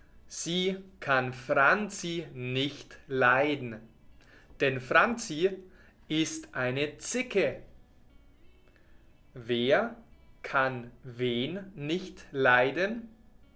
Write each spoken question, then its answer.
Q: Wer kann wen nicht leiden?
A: Paula kann Franzi nicht leiden.